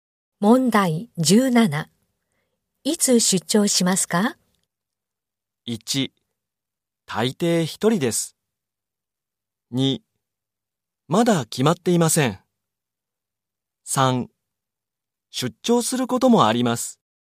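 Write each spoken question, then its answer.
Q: いつ出張しますか?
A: 2: まだ決まっていません。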